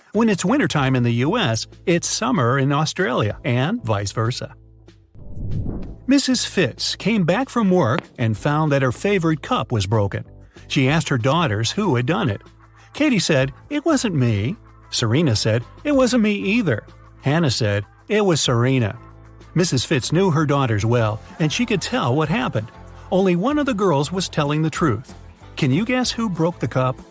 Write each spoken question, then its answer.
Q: Can you guess who broke the cup?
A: So Serena is the honest girl and Katie is the guilty one.